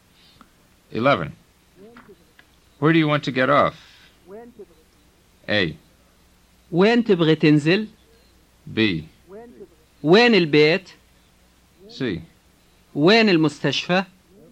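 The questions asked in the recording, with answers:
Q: Where do you want to get off?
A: A: وين تبغى تنزل؟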